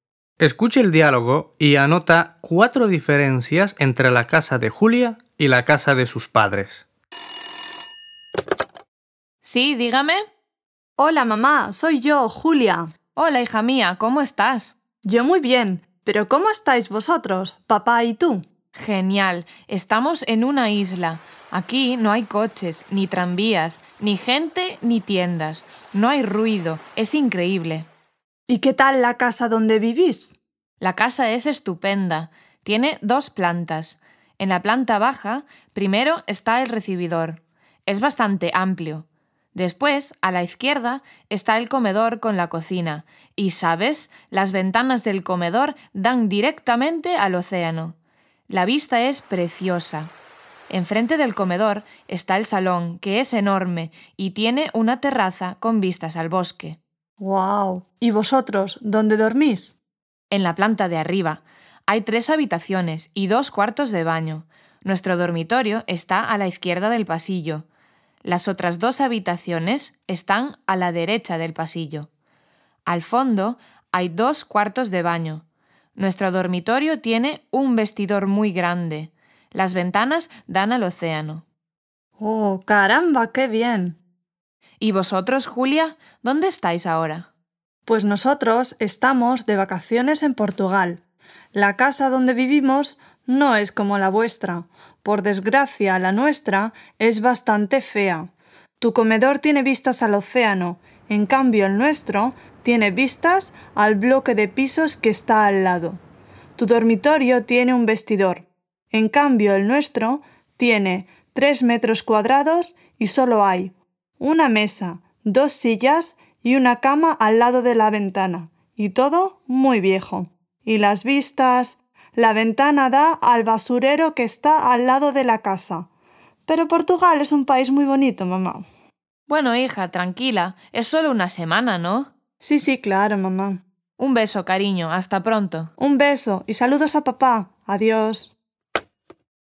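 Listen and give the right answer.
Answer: El comedor de los padres da al océano y el de Julia al bloque de pisos; el dormitorio de los padres tiene un vestidor grande y el de Julia mide 3 m2 con muebles viejos; la ventana del dormitorio de los padres da al océano y la de Julia al basurero; la casa de los padres es estupenda y la de Julia es bastante fea.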